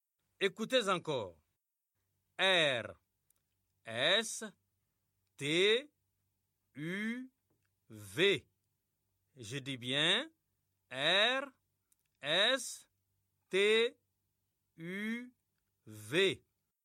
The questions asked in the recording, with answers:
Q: R, S, T, U, V. Je dis bien R, S, T, U, V.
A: J'espère que les élèves ont écrit W.